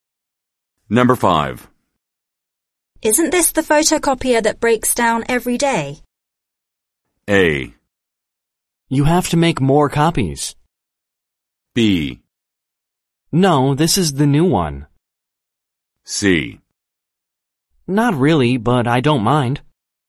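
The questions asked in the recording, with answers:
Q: Isn't this the photocopier that breaks down every day?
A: B: No, this is the new one.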